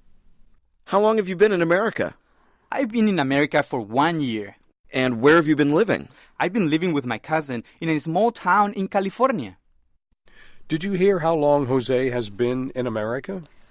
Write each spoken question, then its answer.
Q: Did you hear how long Jose has been in America?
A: 他来美国已经一年了。